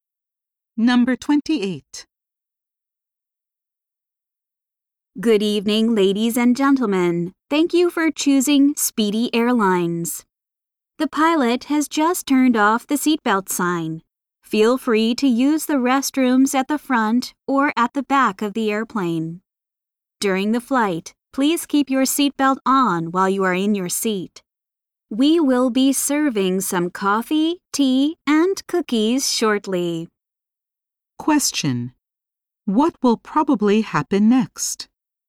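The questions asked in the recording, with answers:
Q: What will probably happen next?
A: Coffee, tea, and cookies will be served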